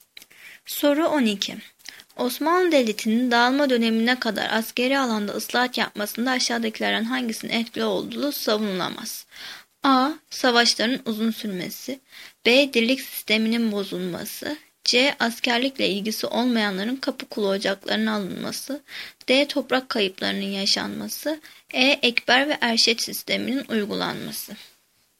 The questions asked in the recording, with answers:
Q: Osmanlı Devleti'nin dağılma dönemine kadar askeri alanda ıslahat yapmasında aşağıdakilerden hangisinin etkili olduğu savunulamaz?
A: Cevap E. Ekber ve Erşet sisteminin uygulanması.